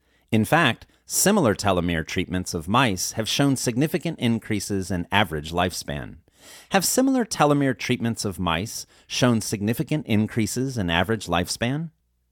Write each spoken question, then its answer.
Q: Have similar telomere treatments of mice shown significant increases in average lifespan?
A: Yes, similar telomere treatments of mice have shown significant increases in average lifespan.